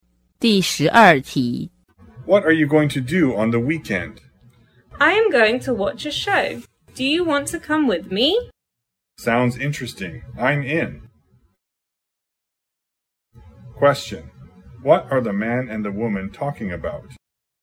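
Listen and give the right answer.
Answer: Their weekend plans: going to watch a show.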